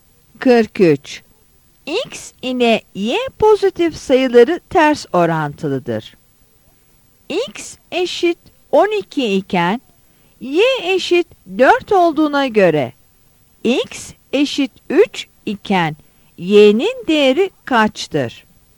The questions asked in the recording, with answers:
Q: X eşit 12 iken Y eşit 4 olduğuna göre X eşit 3 iken Y'nin değeri kaçtır?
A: Yanıt C'dir.